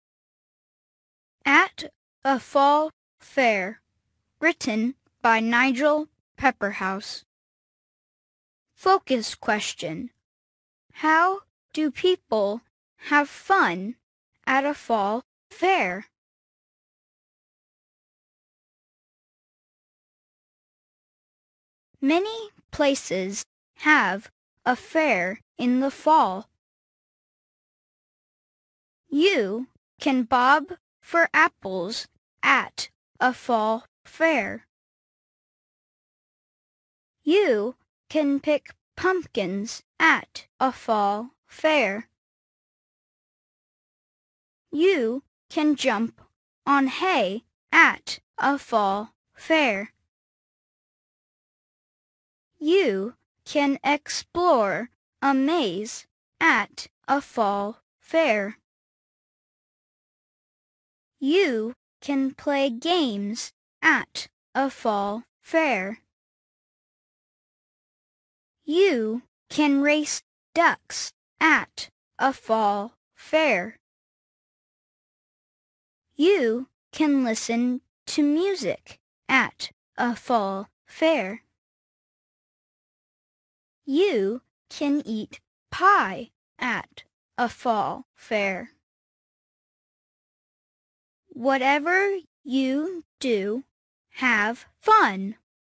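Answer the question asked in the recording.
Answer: They bob for apples, pick pumpkins, jump on hay, explore a maze, play games, race ducks, listen to music and eat pie.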